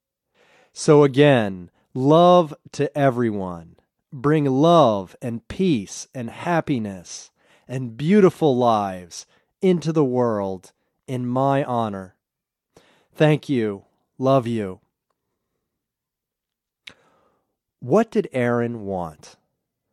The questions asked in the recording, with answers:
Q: What did Aaron want?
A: Aaron wanted everyone to bring love and peace and happiness and beautiful lives into the world.